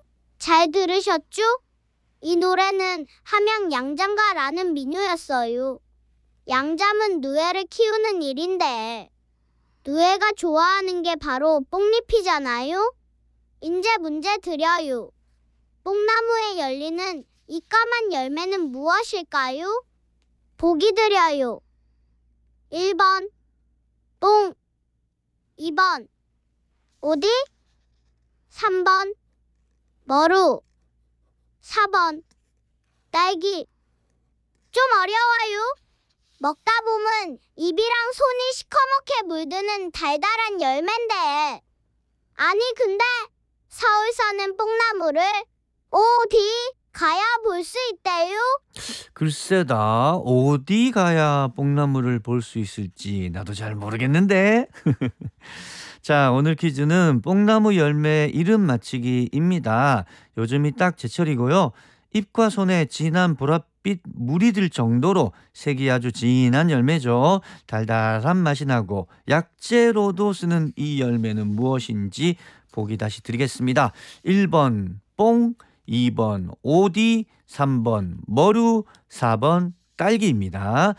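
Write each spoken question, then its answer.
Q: 뽕나무에 열리는 이 까만 열매는 무엇일까요?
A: 2번: 오디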